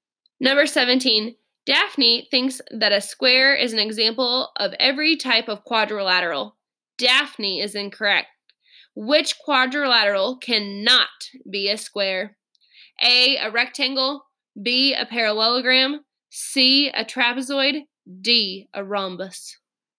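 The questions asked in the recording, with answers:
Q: Which quadrilateral cannot be a square?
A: C: a trapezoid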